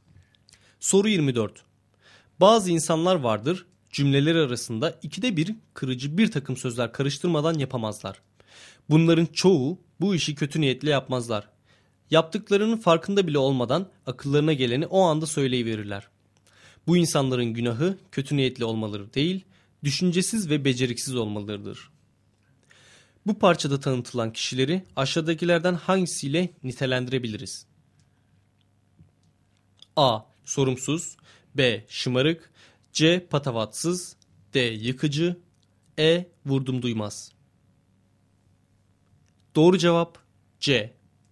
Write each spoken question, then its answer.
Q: Bu parçada tanıtılan kişileri aşağıdakilerden hangisiyle nitelendirebiliriz?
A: Doğru cevap C.